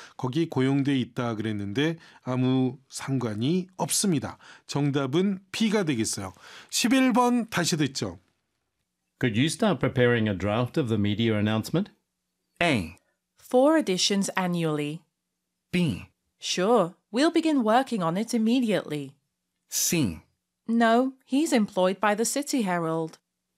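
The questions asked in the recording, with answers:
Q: Could you start preparing a draft of the media announcement?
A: B: Sure, we'll begin working on it immediately.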